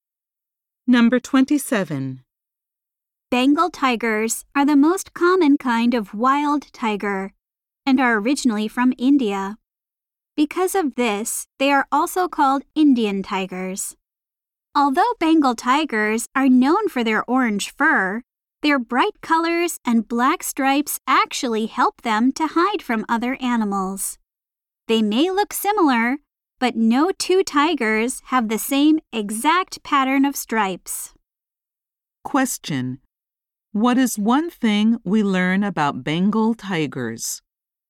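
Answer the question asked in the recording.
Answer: No two tigers have exactly the same stripe pattern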